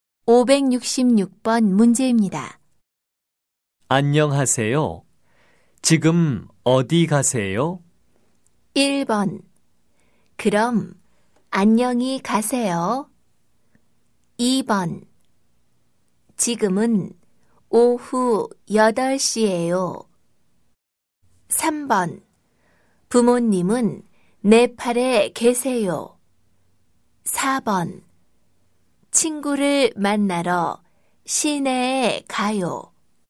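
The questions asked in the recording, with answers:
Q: 안녕하세요. 지금 어디 가세요?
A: 4: 친구를 만나러 시내에 가요.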